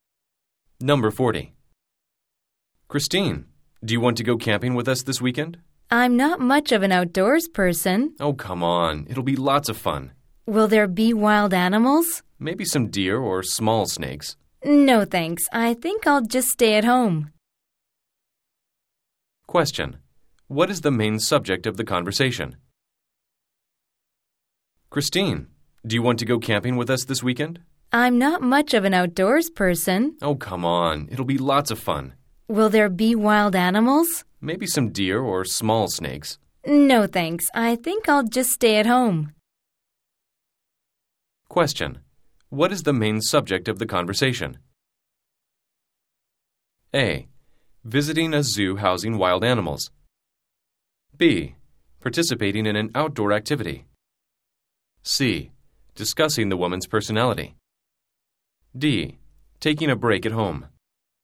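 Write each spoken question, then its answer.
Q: What is the main subject of the conversation?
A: B: Participating in an outdoor activity.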